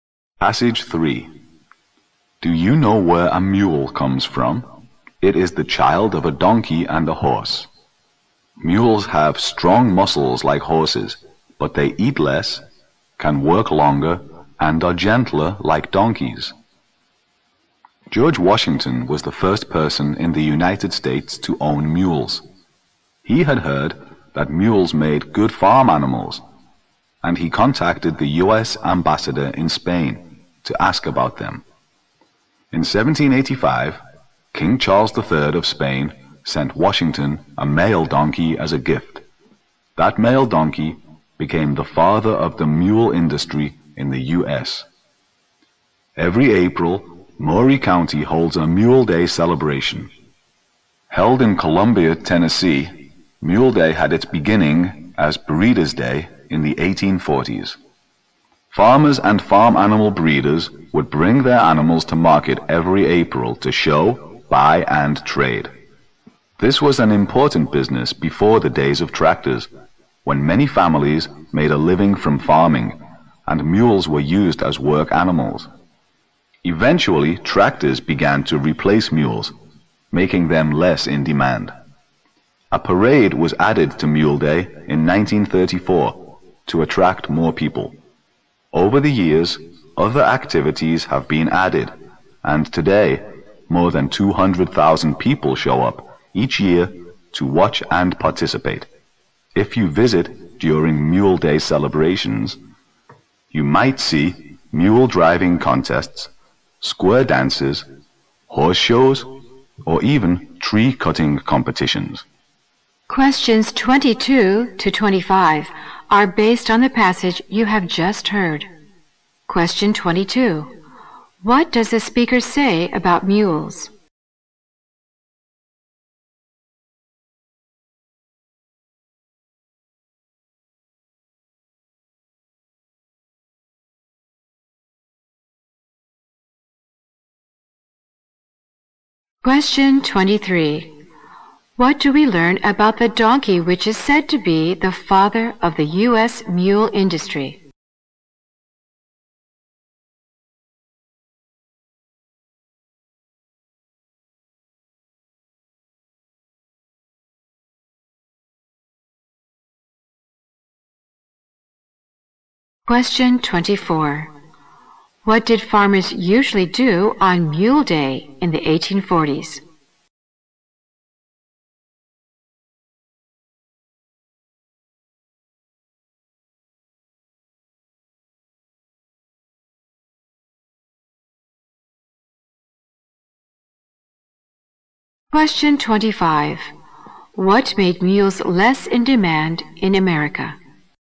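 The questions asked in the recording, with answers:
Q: What does the speaker say about mules?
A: They are strong like horses but eat less, work longer and are gentler

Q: What did farmers usually do on Mule Day in the 1840s?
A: Bring their animals to market to show, buy and trade

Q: What made mules less in demand in America?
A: Tractors replacing them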